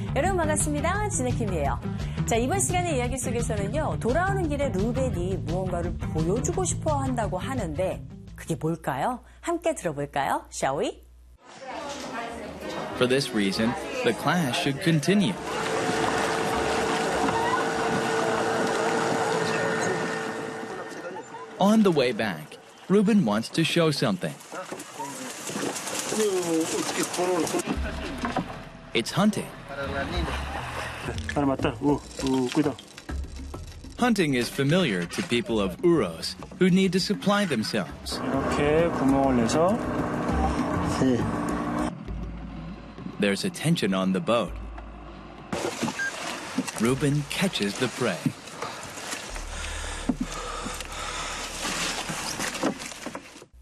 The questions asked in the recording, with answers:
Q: 돌아오는 길에 루벤이 무언가를 보여주고 싶어 한다고 하는데 그게 뭘까요?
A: It's hunting. 사냥을 보여주길 원한 모양이에요.